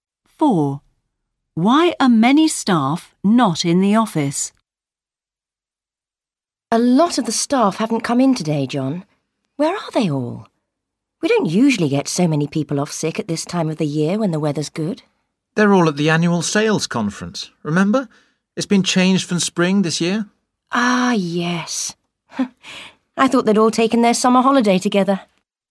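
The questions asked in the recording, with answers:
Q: Why are many staff not in the office?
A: They are at the annual sales conference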